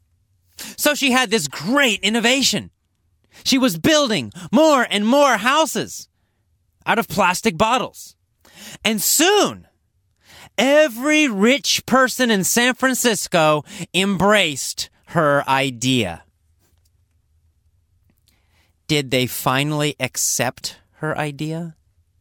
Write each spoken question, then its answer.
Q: Did they finally accept her idea?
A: Yes, they did. They finally embraced her idea.